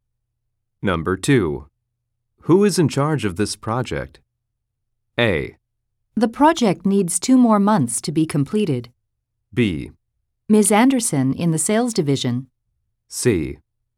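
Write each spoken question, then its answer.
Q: Who is in charge of this project?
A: B: Ms. Anderson in the sales division.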